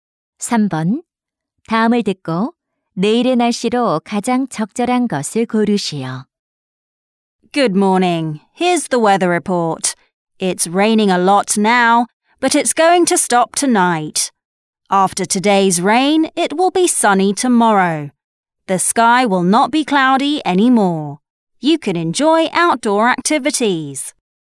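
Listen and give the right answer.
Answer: 맑음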